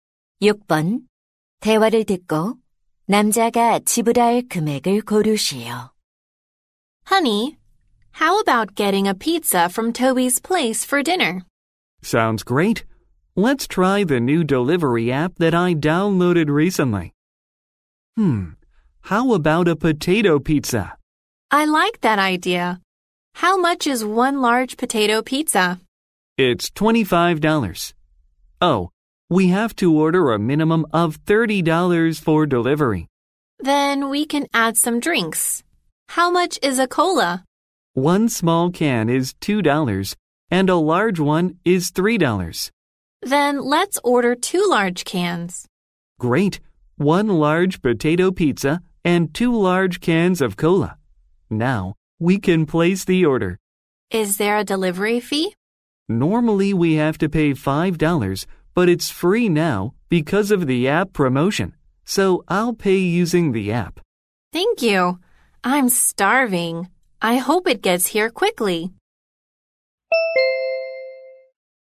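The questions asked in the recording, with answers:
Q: 대화를 듣고 남자가 지불할 금액을 고르시오.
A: $31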